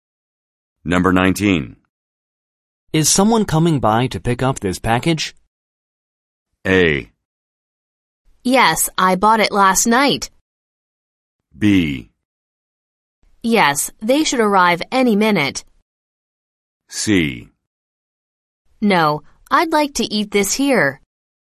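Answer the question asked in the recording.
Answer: B: Yes, they should arrive any minute.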